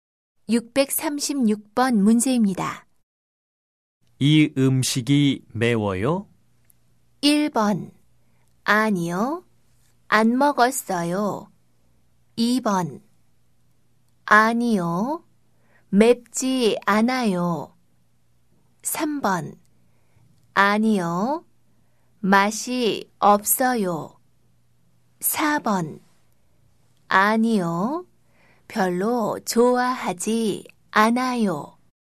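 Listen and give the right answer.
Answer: 2: 아니요, 맵지 않아요.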